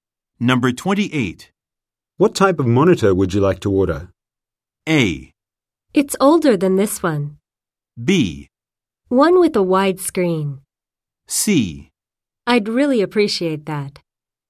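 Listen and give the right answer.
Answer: B: One with a wide screen.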